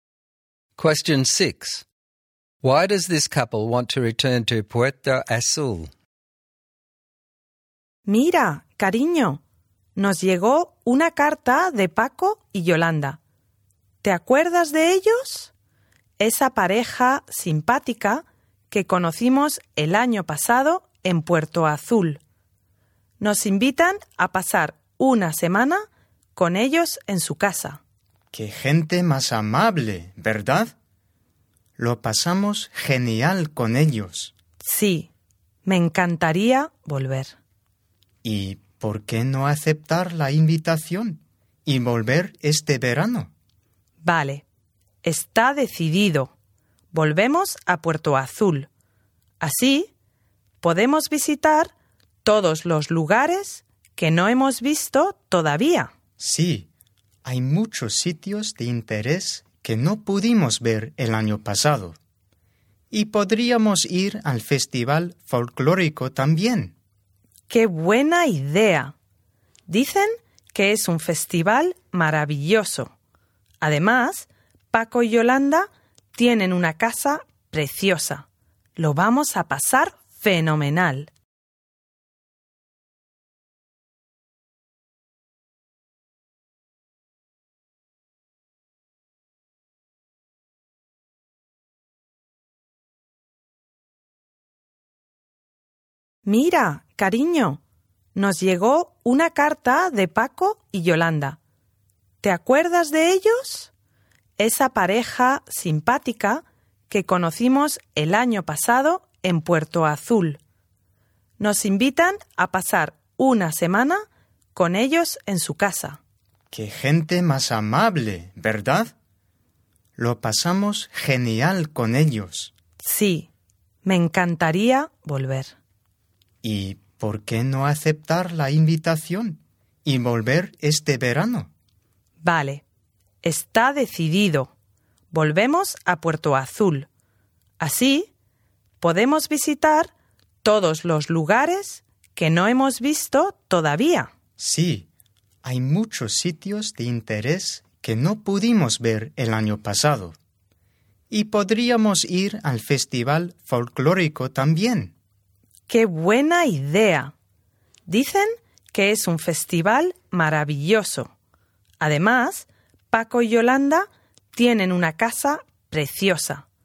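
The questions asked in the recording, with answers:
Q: Why does this couple want to return to Puerto Azul?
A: Their friends Paco and Yolanda invited them, and they want to see places they missed last year and go to the folk festival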